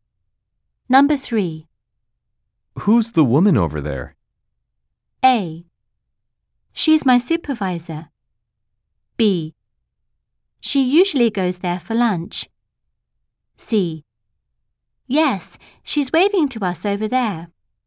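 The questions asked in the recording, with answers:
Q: Who's the woman over there?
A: A: She's my supervisor.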